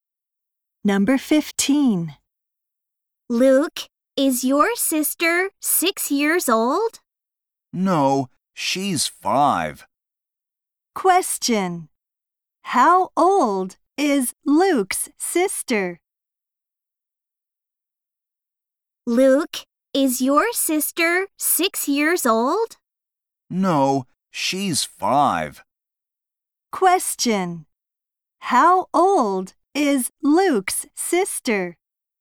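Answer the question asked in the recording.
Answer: Five years old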